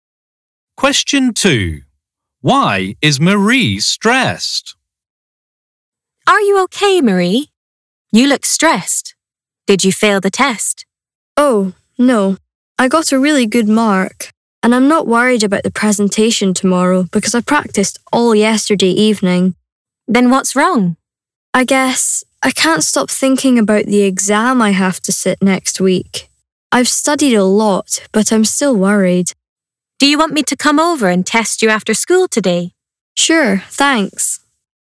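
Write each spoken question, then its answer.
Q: Why is Marie stressed?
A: She is worried about the exam she has next week.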